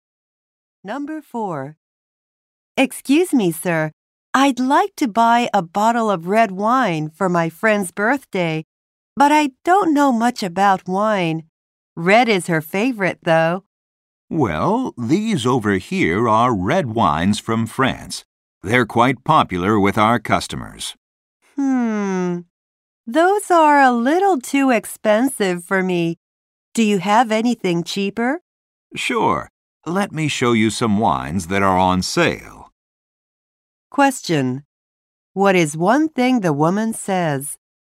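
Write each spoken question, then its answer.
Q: What is one thing the woman says?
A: The French wines are too expensive for her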